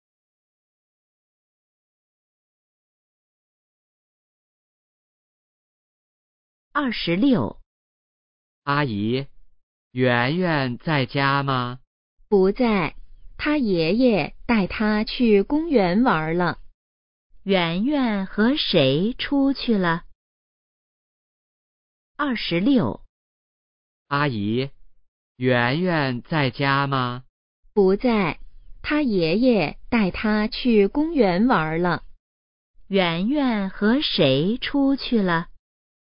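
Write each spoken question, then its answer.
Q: 圆圆和谁出去了?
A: 爷爷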